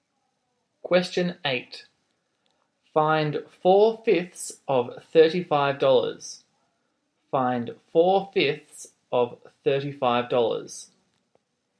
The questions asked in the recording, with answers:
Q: Find 4/5 of $35.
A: your answer is $28.